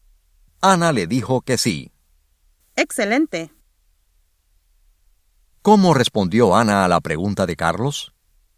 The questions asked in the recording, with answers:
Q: ¿Cómo respondió Ana a la pregunta de Carlos?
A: Ella le dijo que sí.